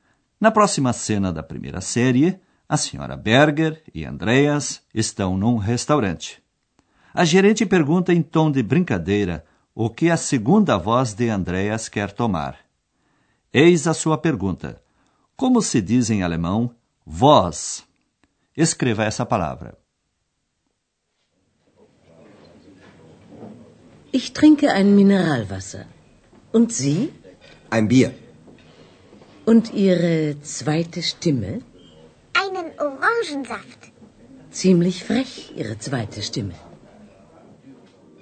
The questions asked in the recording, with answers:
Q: Como se diz em alemão voz?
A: A palavra é Stimme.